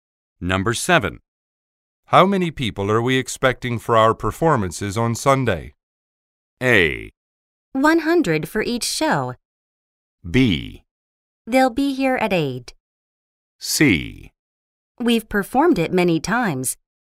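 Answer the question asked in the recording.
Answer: A: 100 for each show.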